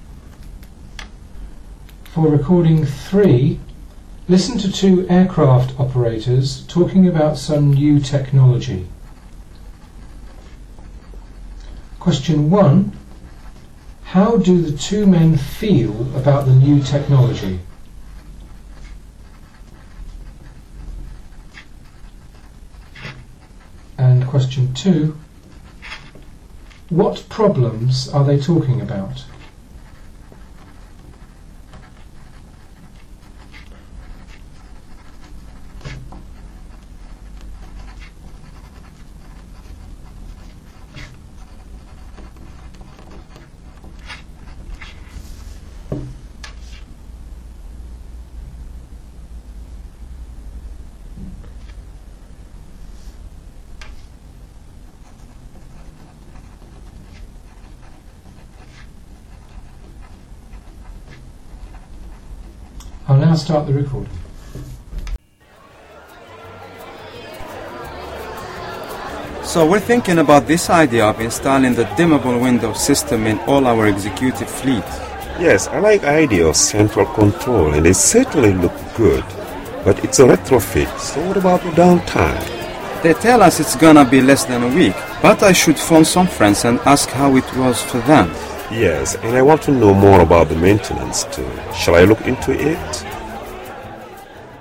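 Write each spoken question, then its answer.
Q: What problems are they talking about?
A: Downtime for the retrofit and maintenance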